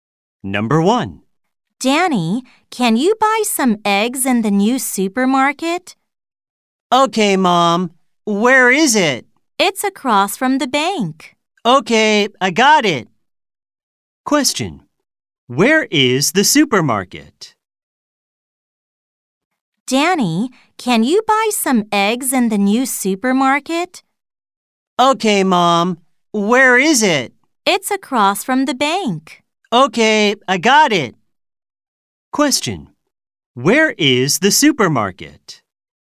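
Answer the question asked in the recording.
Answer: Across from the bank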